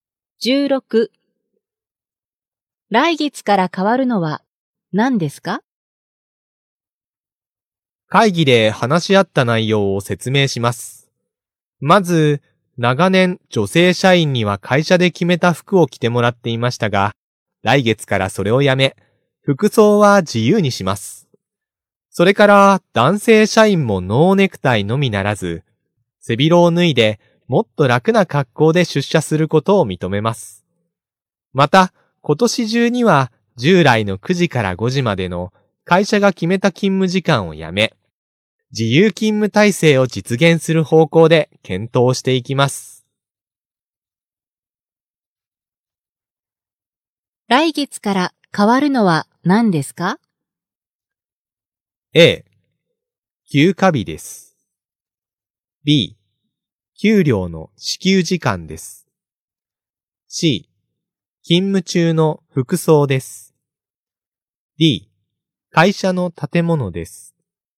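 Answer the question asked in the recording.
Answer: C: 勤務中の服装です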